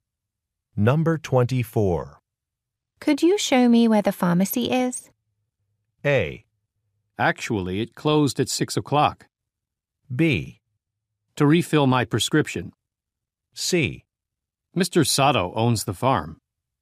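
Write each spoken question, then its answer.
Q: Could you show me where the pharmacy is?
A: A: Actually, it closed at 6 o'clock.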